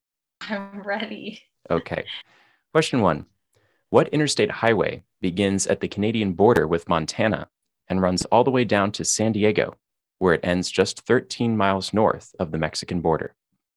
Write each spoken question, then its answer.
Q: What interstate highway begins at the Canadian border with Montana and runs all the way down to San Diego, where it ends just 13 miles north of the Mexican border?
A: This is I-15